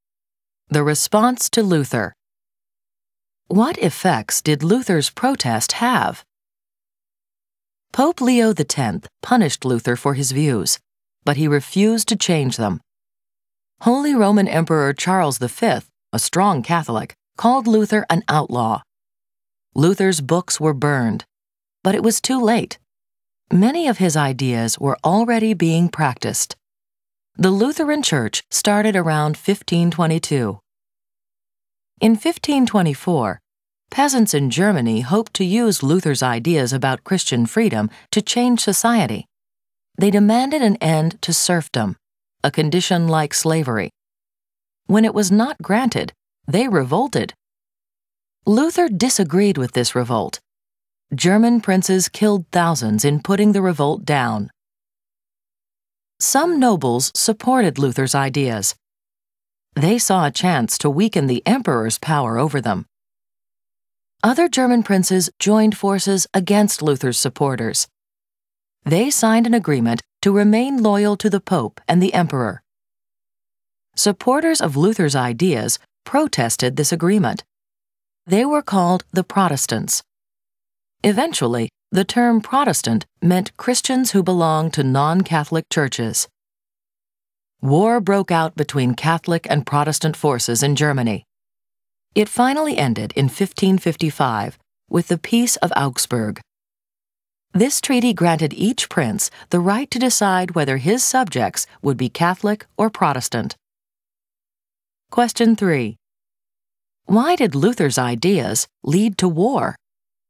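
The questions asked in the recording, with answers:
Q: Why did Luther's ideas lead to war?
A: Princes split into Luther's supporters and Catholics loyal to the Pope and emperor, and they fought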